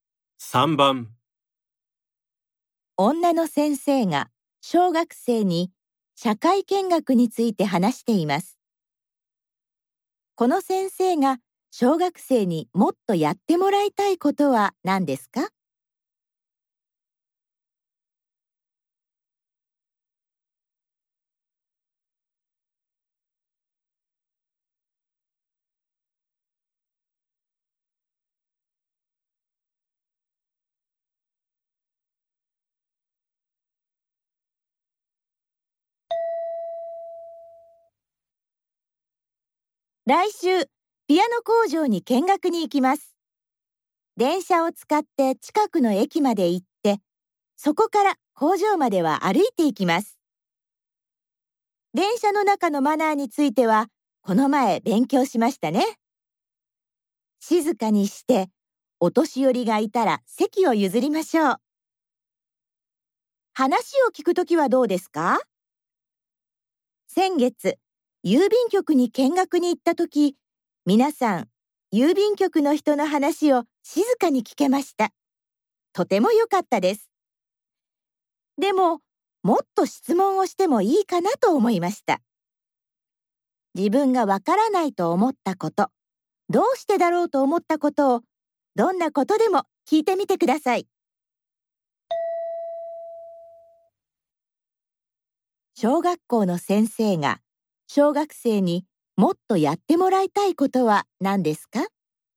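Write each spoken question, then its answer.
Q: 小学校の先生が、小学生にもっとやってもらいたいことは何ですか?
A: 見学先でもっと質問をすること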